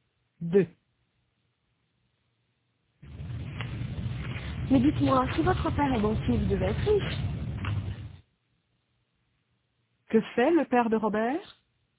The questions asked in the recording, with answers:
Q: Que fait le père de Robert?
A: Il est banquier.